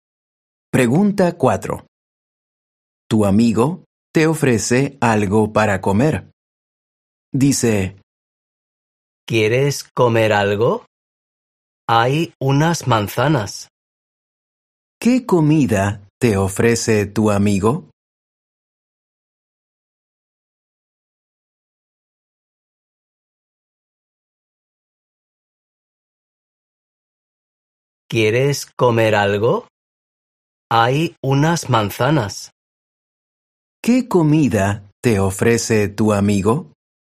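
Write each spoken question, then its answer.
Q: ¿Qué comida te ofrece tu amigo?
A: Unas manzanas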